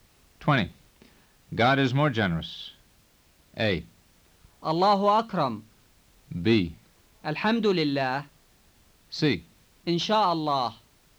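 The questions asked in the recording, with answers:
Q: God is more generous.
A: A: الله أكرم.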